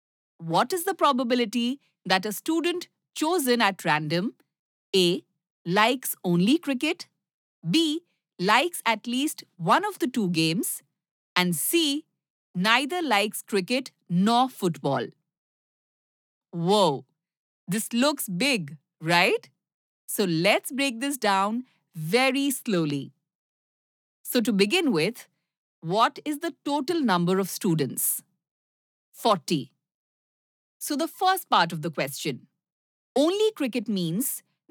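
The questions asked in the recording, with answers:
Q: What is the probability that a student chosen at random A. likes only cricket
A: 15/40 = 3/8

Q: B. likes at least one of the two games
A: 33/40

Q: C. neither likes cricket nor football?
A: 7/40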